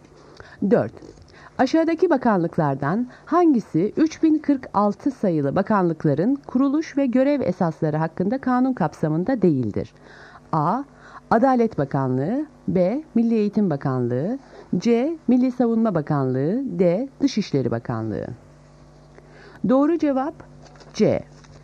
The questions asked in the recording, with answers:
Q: Aşağıdaki bakanlıklardan hangisi 3046 sayılı bakanlıkların kuruluş ve görev esasları hakkında kanun kapsamında değildir?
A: Doğru cevap C. Milli Savunma Bakanlığı.